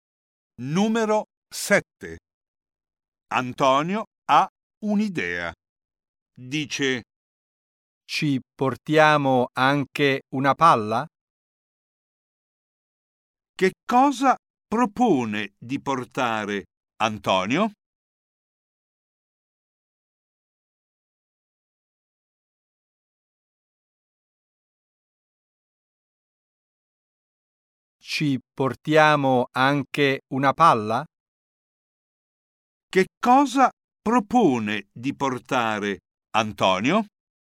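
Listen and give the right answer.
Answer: Una palla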